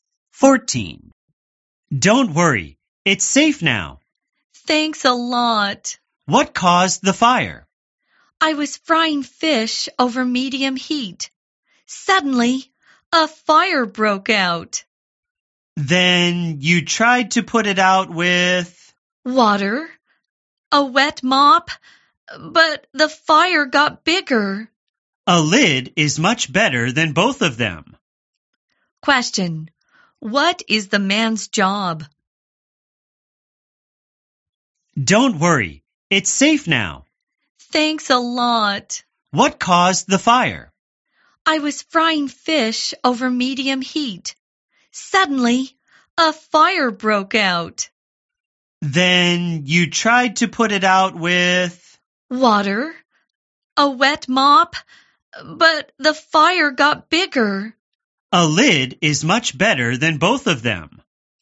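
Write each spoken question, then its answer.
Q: What is the man's job?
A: A firefighter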